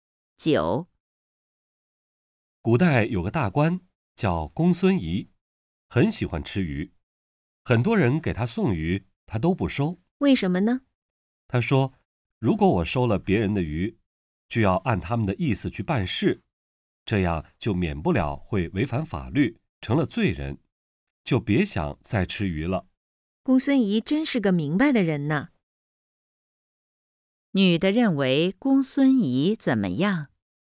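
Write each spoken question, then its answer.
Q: 女的认为公孙仪怎么样?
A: 是个明白的人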